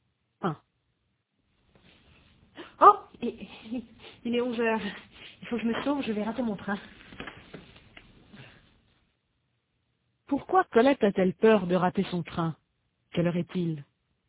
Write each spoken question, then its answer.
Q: Quelle heure est-il?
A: Il est 11h.